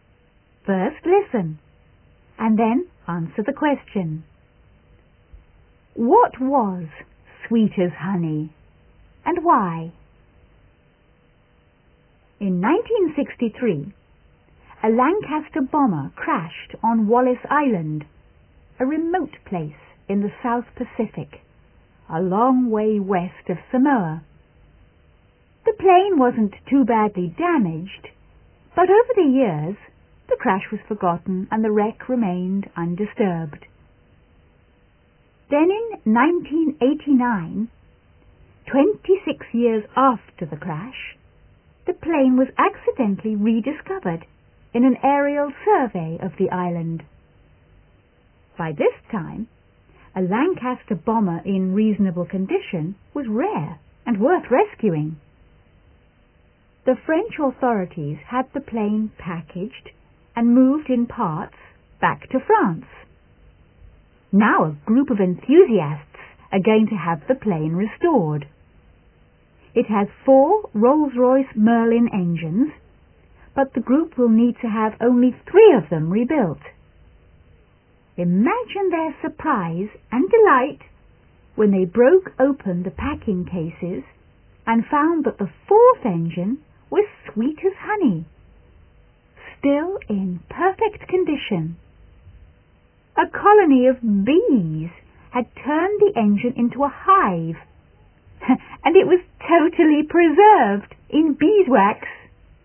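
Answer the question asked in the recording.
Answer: The fourth engine of the plane, because bees had made a hive in it and preserved it in beeswax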